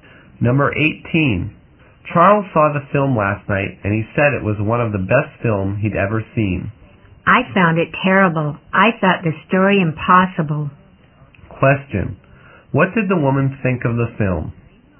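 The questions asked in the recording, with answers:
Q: Question, what did the woman think of the film?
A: She thought it was terrible.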